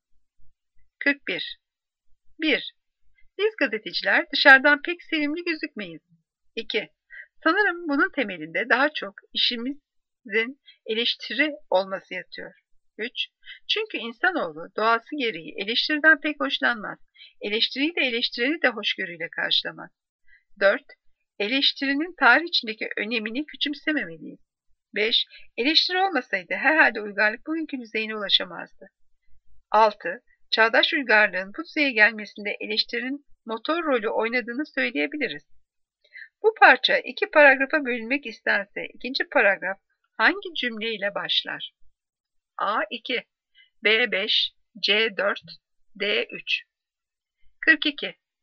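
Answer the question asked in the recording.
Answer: C: 4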